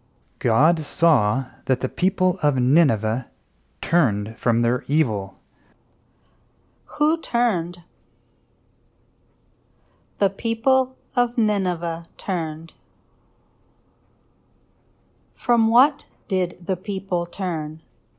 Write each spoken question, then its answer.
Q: From what did the people turn?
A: The people turned from their evil.